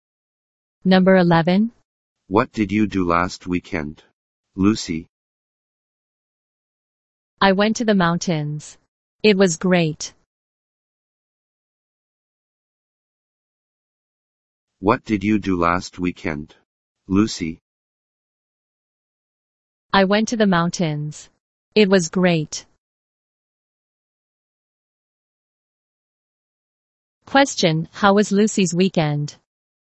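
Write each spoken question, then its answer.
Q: Question, how was Lucy's weekend?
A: Great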